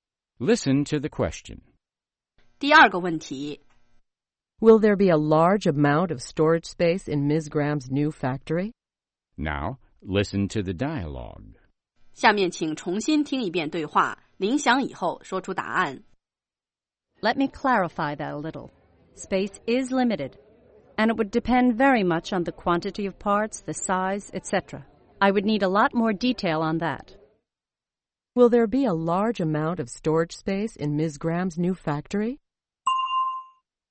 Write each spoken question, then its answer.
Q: Will there be a large amount of storage space in Ms. Graham's new factory?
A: No, there won't be. As Ms. Graham says, space is limited.